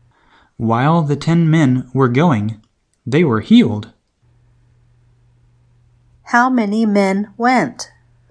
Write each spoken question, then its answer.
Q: How many men went?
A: All 10 men went.